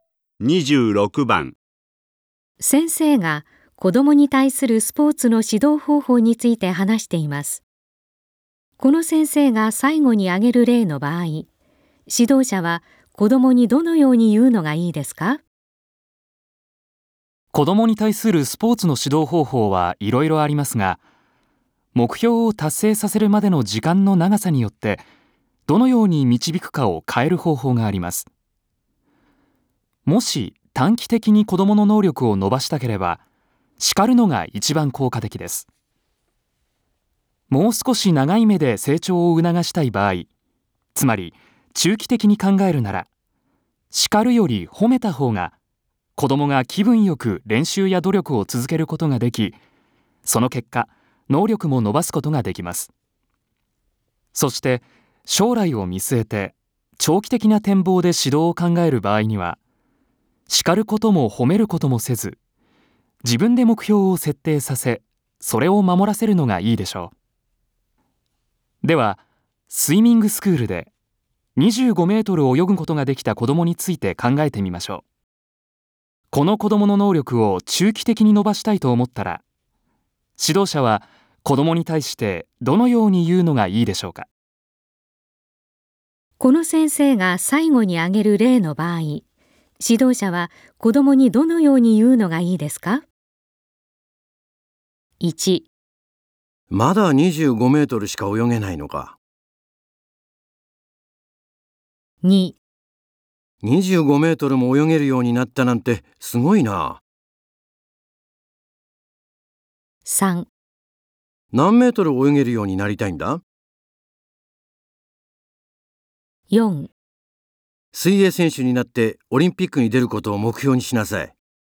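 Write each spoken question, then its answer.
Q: この先生が最後に挙げる例の場合、指導者は子どもにどのように言うのがいいですか?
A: 2: 25メートルも泳げるようになったなんてすごいな。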